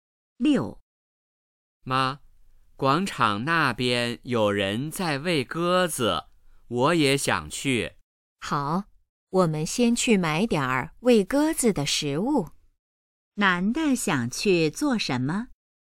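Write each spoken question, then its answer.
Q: 男的想去做什么?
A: 去广场喂鸽子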